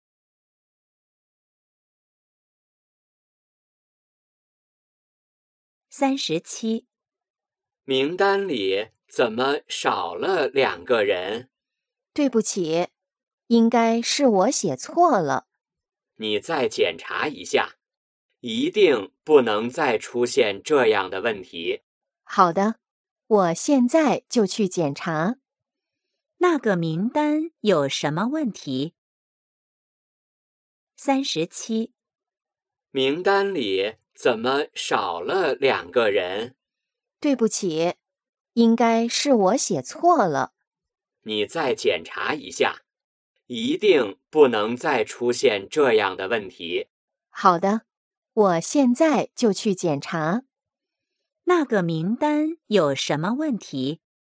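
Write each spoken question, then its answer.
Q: 那个名单有什么问题?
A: 少了两个人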